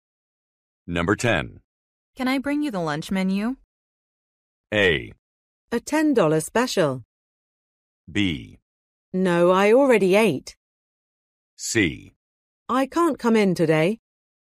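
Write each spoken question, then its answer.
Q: Can I bring you the lunch menu?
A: B: No, I already ate.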